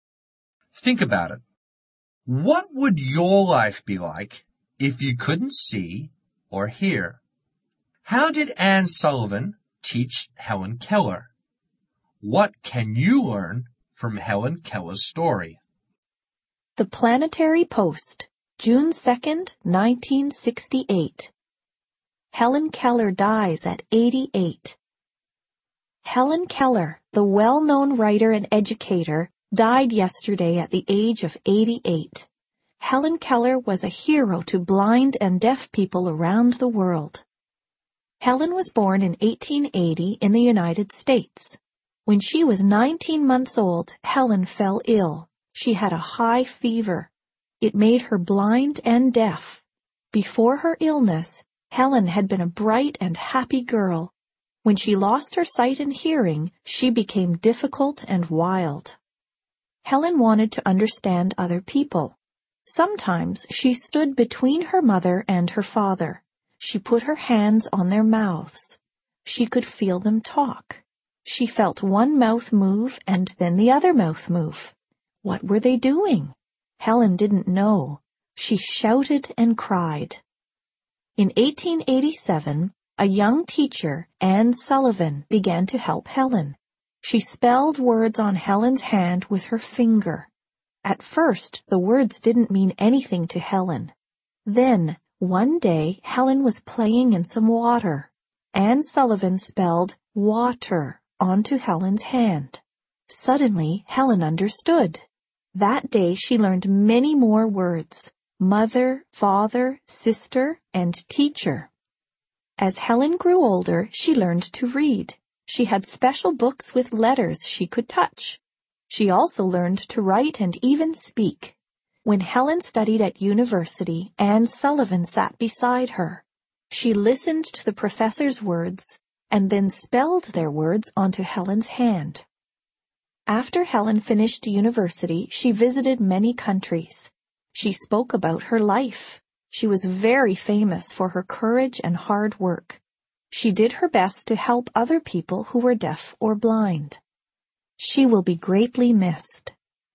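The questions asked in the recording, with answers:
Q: How did Anne Sullivan teach Helen Keller?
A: She spelled words on Helen's hand with her finger.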